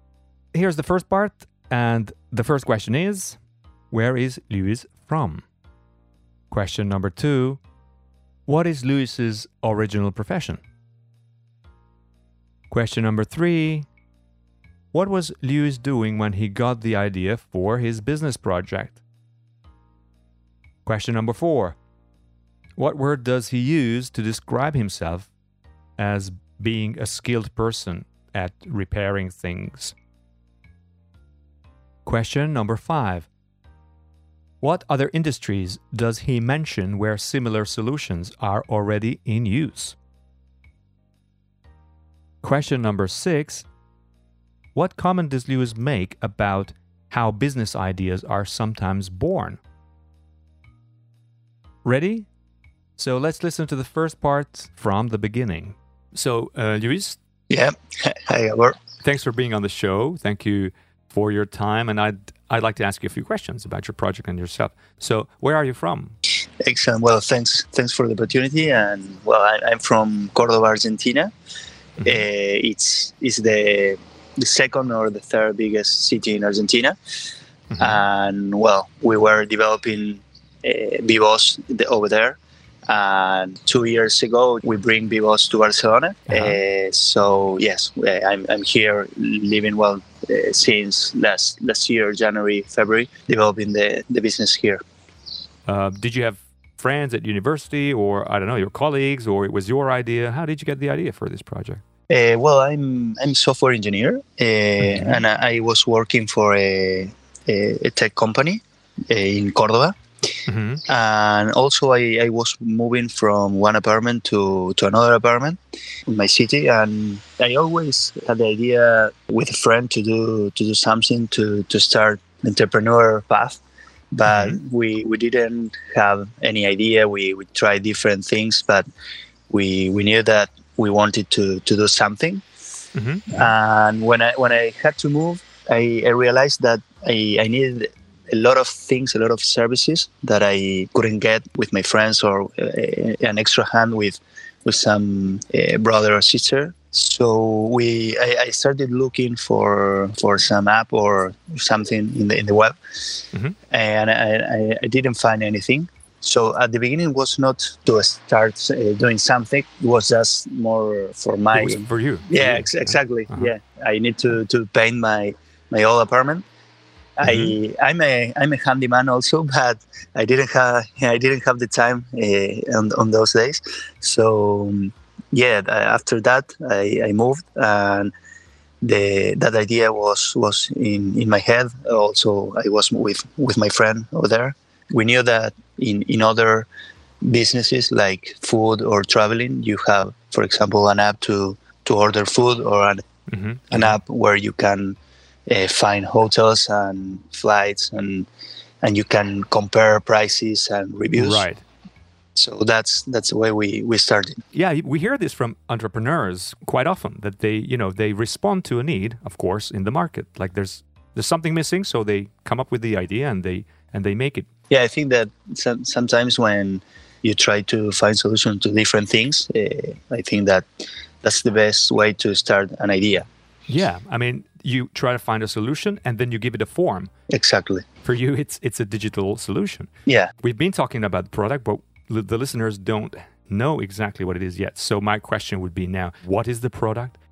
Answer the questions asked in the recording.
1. Well, he's from Argentina.
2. Well, he's a software engineer by profession.
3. He was moving from one apartment to another, and he needed some services that he couldn't find or couldn't find easily.
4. Well, he says he's a handyman.
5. He mentions food ordering or booking hotels and flights, where you can compare prices and check reviews and stuff like that.
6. And he basically says that they respond to a need. So there is a need for which there is no solution at that moment in the market.